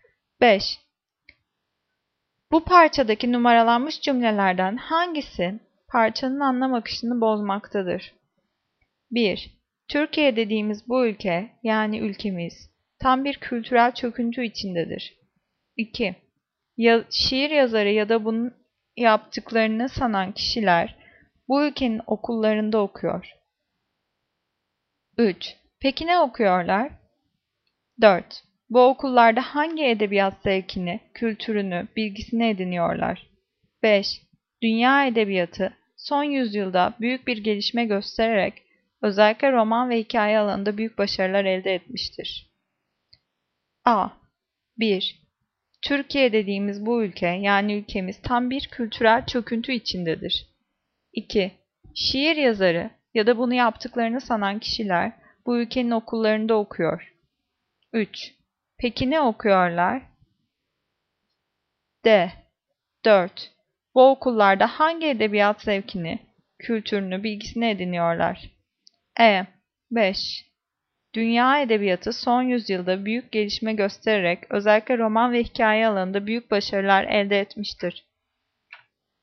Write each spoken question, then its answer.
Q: Bu parçadaki numaralanmış cümlelerden hangisi parçanın anlam akışını bozmaktadır?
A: Cevap E. 5. Dünya edebiyatı son yüzyılda büyük bir gelişme göstererek özellikle roman ve hikaye alanında büyük başarılar elde etmiştir.